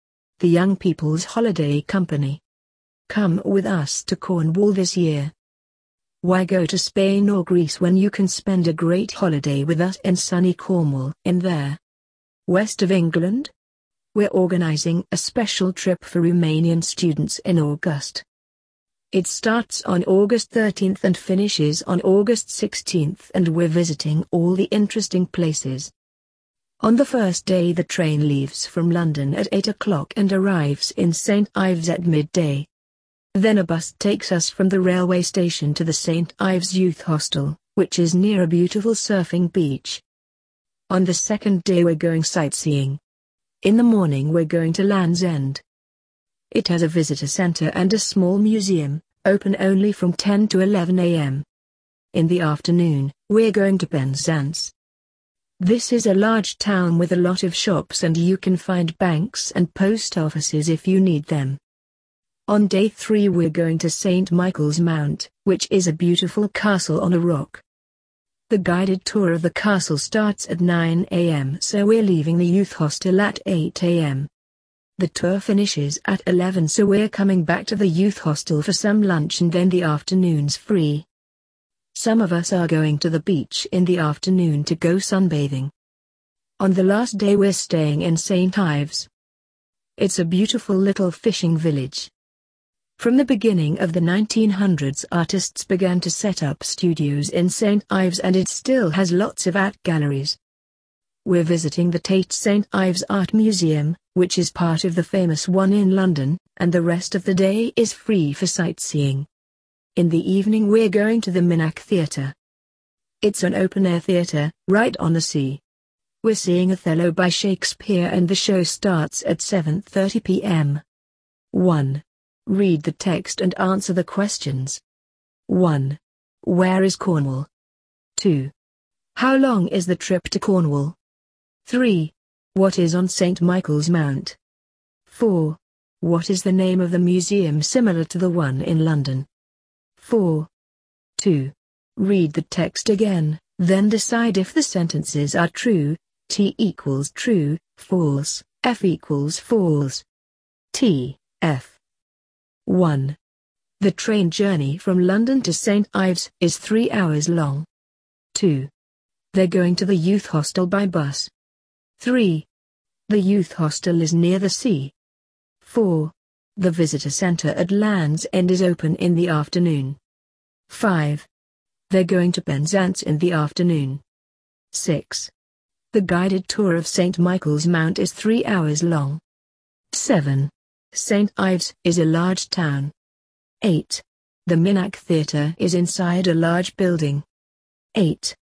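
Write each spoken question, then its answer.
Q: Where is Cornwall?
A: In the West of England

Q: How long is the trip to Cornwall?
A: Four days (August 13th to 16th)

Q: What is on St. Michael's Mount?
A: A beautiful castle

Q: What is the name of the museum similar to the one in London?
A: The Tate St. Ives Art Museum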